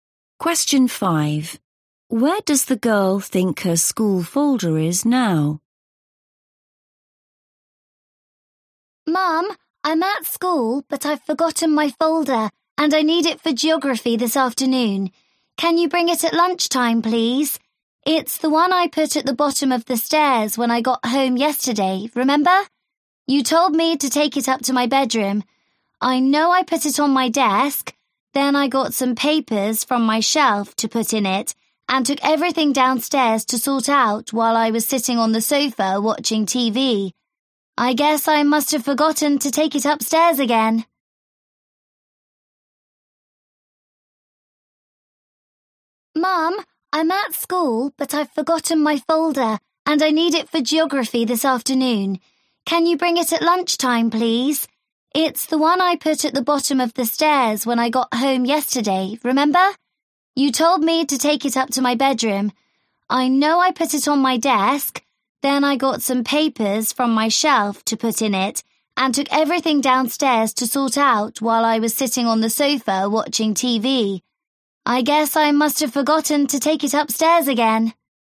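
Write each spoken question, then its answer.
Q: Where does the girl think her school folder is now?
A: Downstairs, by the sofa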